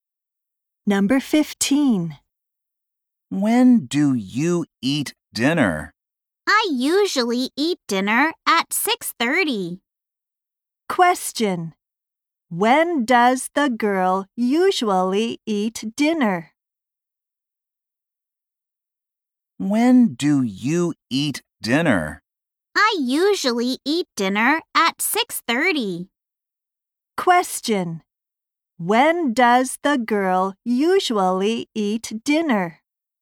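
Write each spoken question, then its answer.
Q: When does the girl usually eat dinner?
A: At 6:30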